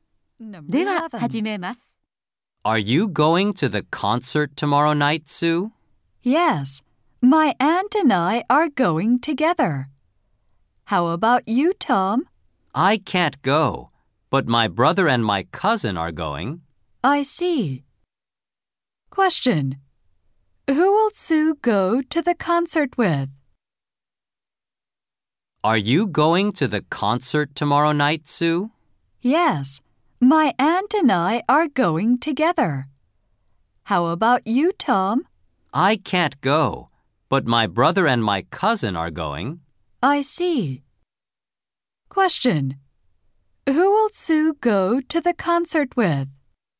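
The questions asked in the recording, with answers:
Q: Who will Sue go to the concert with?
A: Her aunt.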